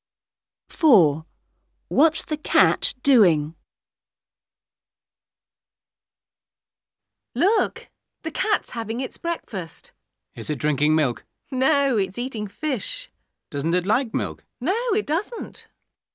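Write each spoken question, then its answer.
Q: What's the cat doing?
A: Eating fish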